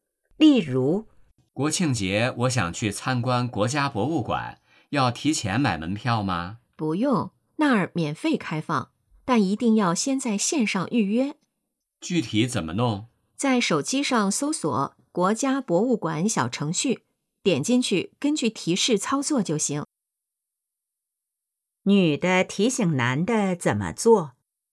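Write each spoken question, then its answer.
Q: 女的提醒男的怎么做?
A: 先在网上(用国家博物馆小程序)预约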